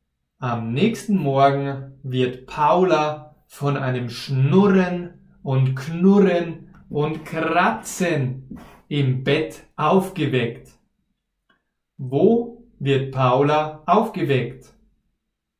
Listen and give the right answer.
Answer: Im Bett. Sie wird am nächsten Morgen im Bett aufgeweckt.